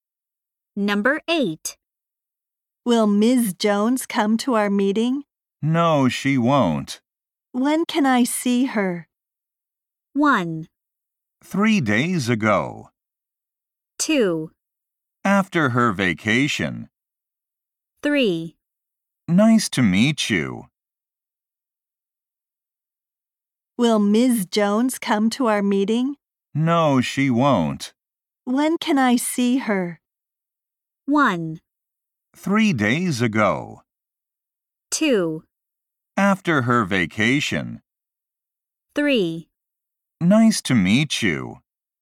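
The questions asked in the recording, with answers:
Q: When can I see her?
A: 2: After her vacation.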